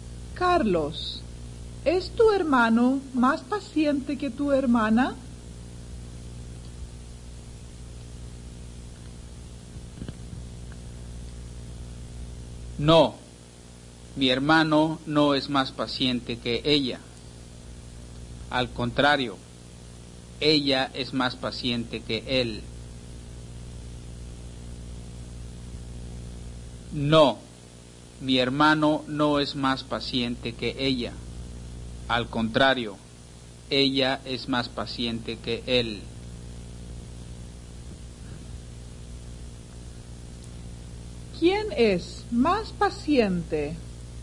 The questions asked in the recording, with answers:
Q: ¿Quién es más paciente?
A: la hermana es más paciente que el hermano.